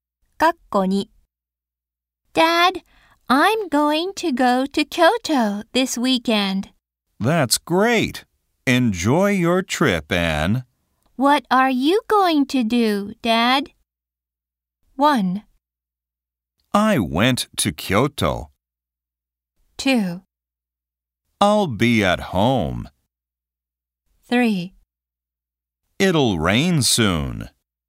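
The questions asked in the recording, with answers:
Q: What are you going to do, Dad?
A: 2: I'll be at home.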